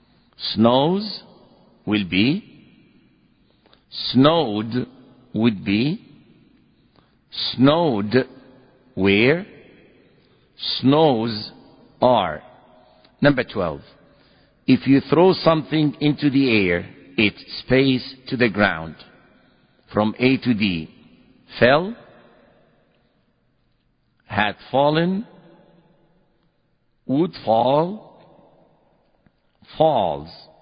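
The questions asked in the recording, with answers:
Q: If you throw something into the air, it, space, to the ground from A to D.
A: D: falls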